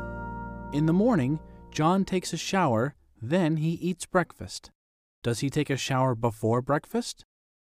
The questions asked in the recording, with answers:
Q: Does he take a shower before breakfast?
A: Yes, he does. He takes a shower before breakfast.